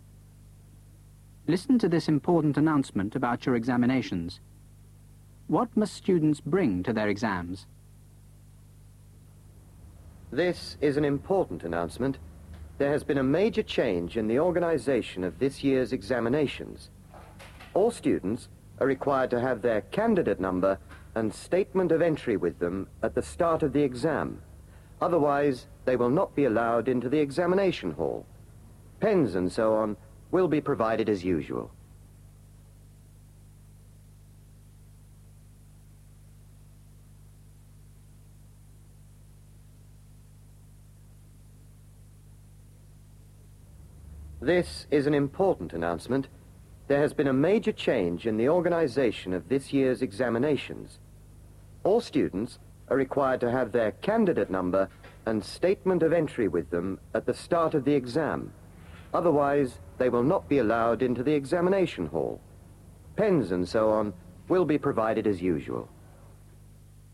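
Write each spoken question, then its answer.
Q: What must students bring to their exams?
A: Their candidate number and statement of entry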